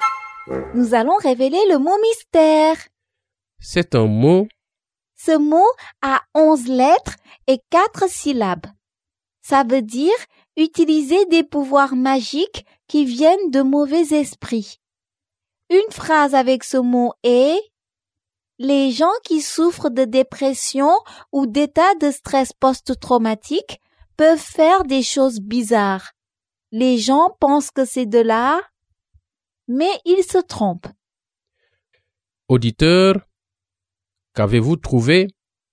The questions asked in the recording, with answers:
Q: Auditeur, qu'avez-vous trouvé?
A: Le mot mystère est sorcellerie.